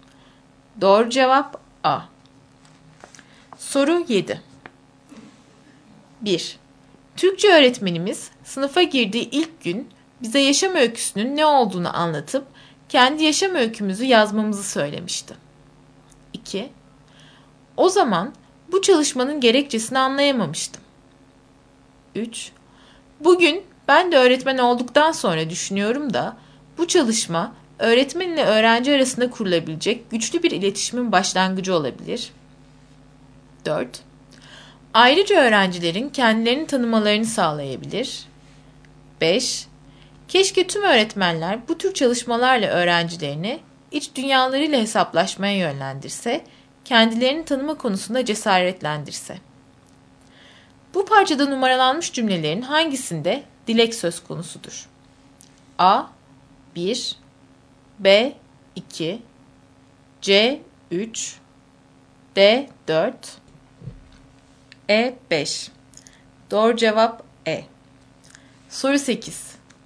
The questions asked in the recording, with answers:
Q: Bu parçada numaralanmış cümlelerin hangisinde dilek söz konusudur?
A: Doğru cevap E.